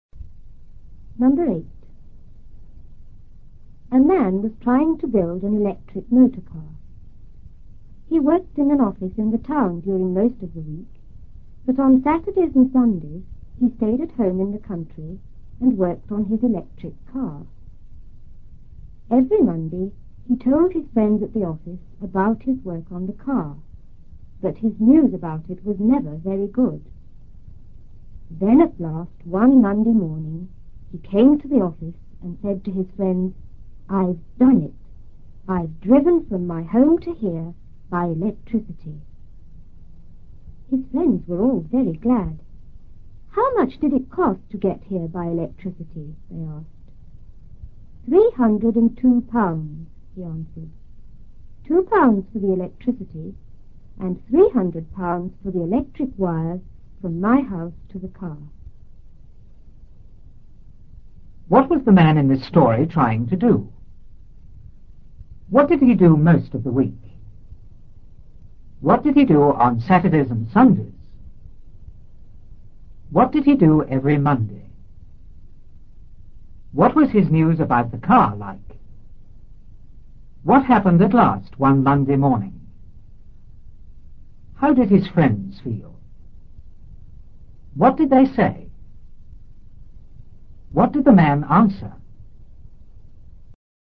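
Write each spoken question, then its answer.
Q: What was the man in this story trying to do?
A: Build an electric motor car

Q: What did he do most of the week?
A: He worked in an office in the town

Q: What did he do on Saturdays and Sundays?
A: He stayed at home in the country and worked on his electric car

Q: What did he do every Monday?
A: He told his friends at the office about his work on the car

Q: What was his news about the car like?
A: Never very good

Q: What happened at last one Monday morning?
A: He said he had driven from his home to the office by electricity

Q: How did his friends feel?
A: Very glad

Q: What did they say?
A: How much did it cost to get here by electricity?

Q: What did the man answer?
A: £302: £2 for the electricity and £300 for the wires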